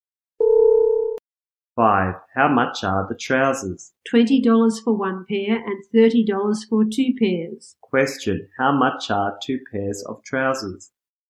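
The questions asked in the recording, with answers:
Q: How much are two pairs of trousers?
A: $30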